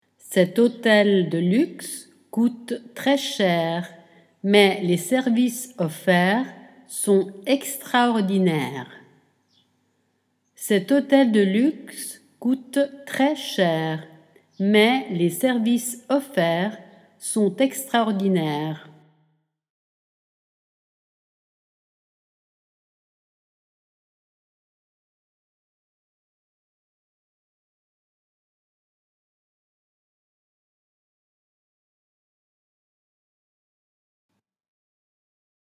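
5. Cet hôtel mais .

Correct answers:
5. de luxe coûte très cher, / les services offerts sont extraordinaires

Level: Dettato di francese A2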